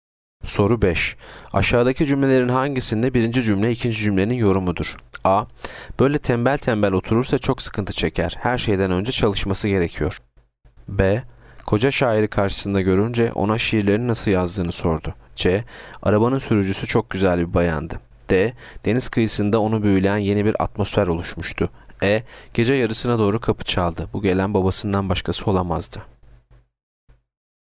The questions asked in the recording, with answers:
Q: Aşağıdaki cümlelerin hangisinde birinci cümle ikinci cümlenin yorumudur?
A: Yanıt A. Böyle tembel tembel oturursa çok sıkıntı çeker.